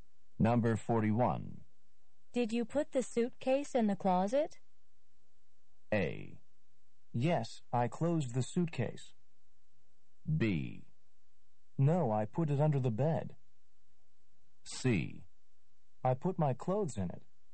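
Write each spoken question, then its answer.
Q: Did you put the suitcase in the closet?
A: B: No, I put it under the bed.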